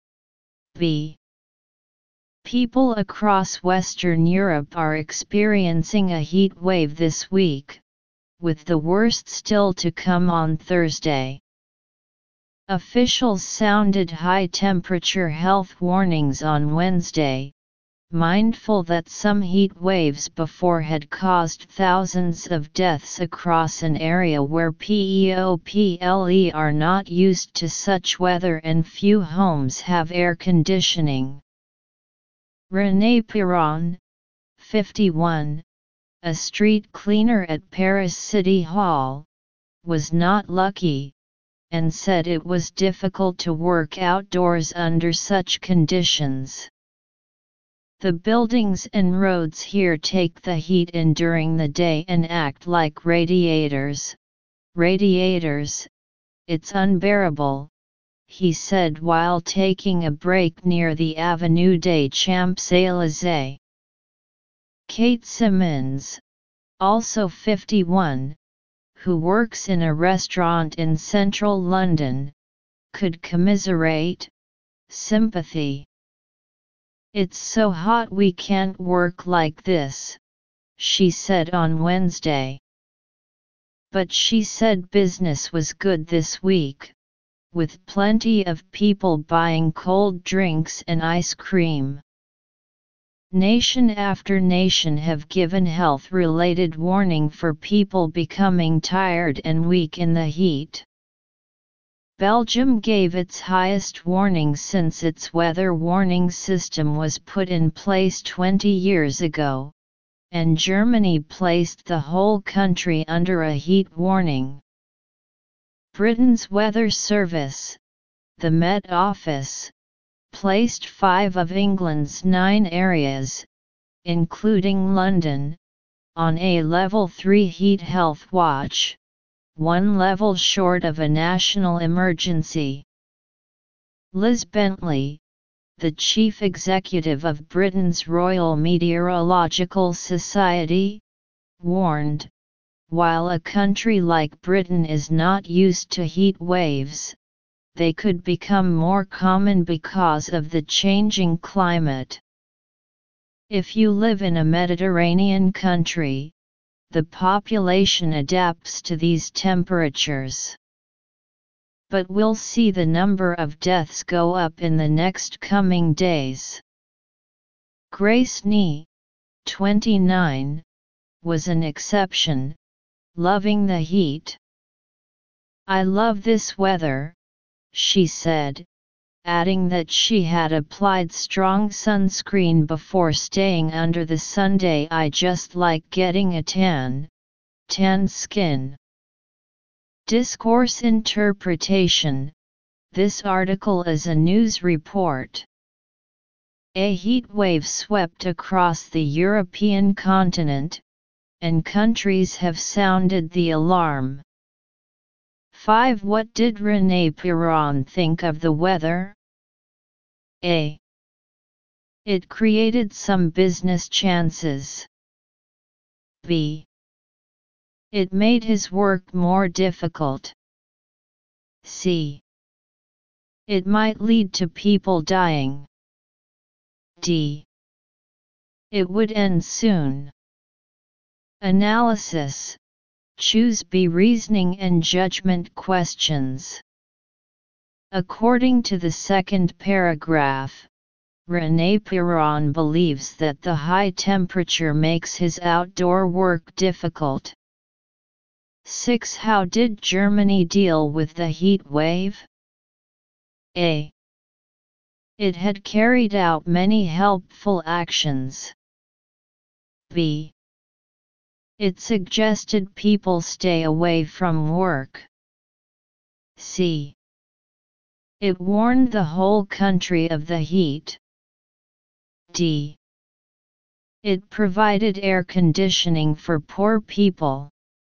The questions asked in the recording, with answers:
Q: What did René Piron think of the weather?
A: Choose B.

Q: How did Germany deal with the heat wave?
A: choose C